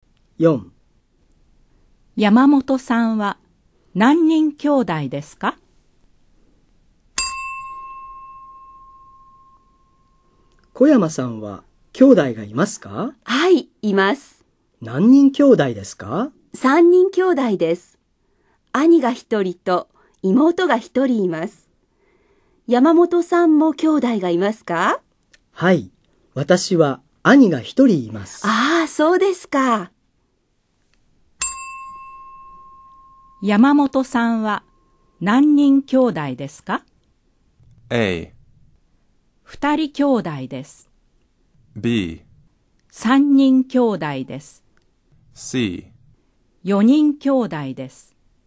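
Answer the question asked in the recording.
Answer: A: 2人兄弟です。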